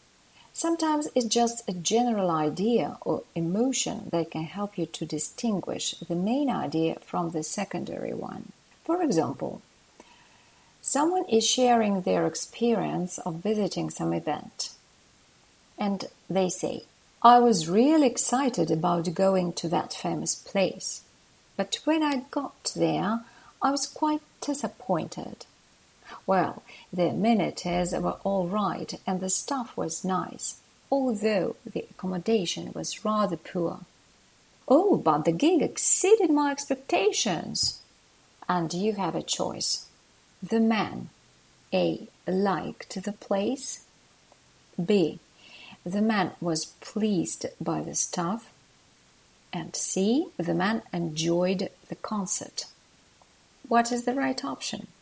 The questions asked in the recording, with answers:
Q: What is the right option?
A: For this reason, the correct answer is option C.